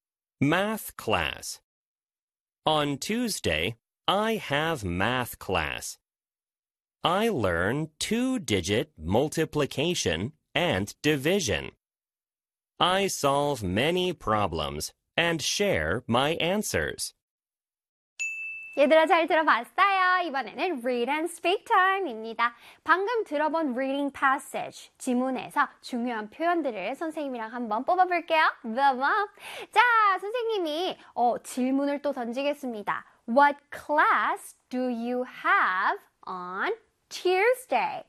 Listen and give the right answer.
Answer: Math 수업이 있다 그랬습니다.